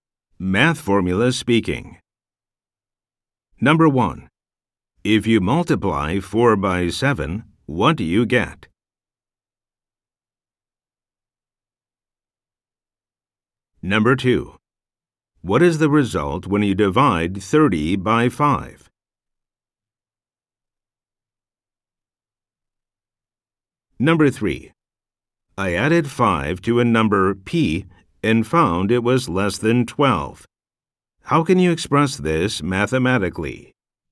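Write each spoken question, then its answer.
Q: If you multiply 4 by 7, what do you get?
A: 28

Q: I added 5 to a number p and found it was less than 12. How can you express this mathematically?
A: p + 5 < 12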